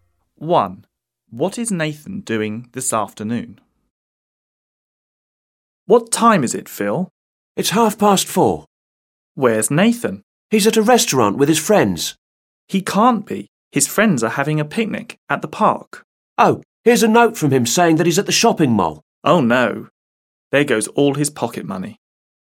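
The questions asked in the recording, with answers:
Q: What is Nathan doing this afternoon?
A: He's at the shopping mall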